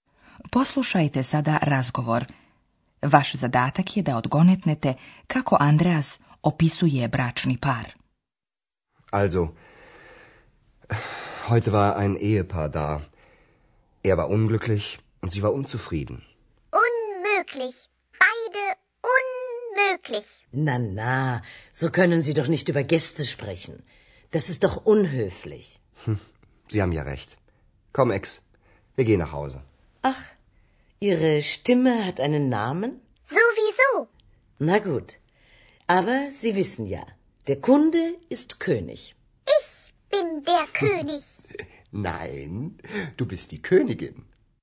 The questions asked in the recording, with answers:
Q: Vaš zadatak je da odgonetnete kako Andreas opisuje bračni par.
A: Andreas kaže da je muškarac bio nesretan, a žena nezadovoljna.